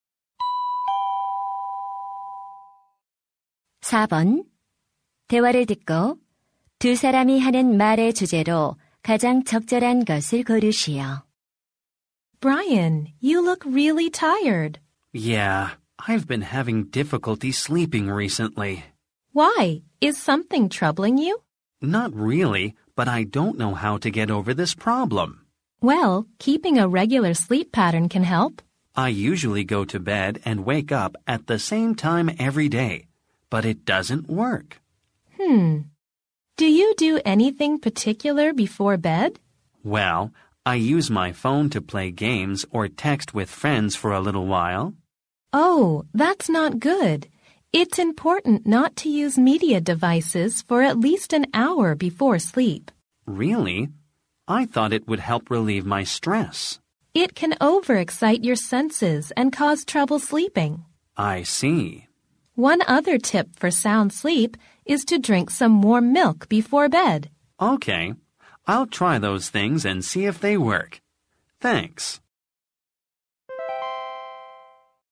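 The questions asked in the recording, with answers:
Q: 대화를 듣고 두 사람이 하는 말의 주제로 가장 적절한 것을 고르시오.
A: 숙면을 위한 방법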